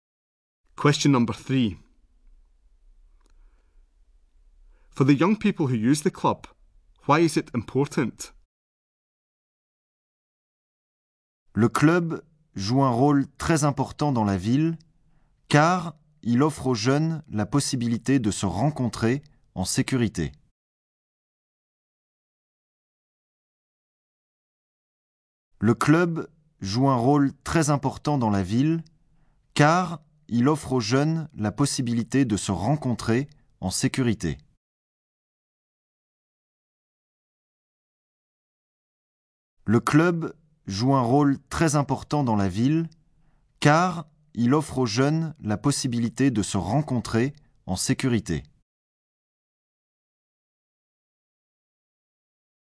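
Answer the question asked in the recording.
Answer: It gives them the chance to meet safely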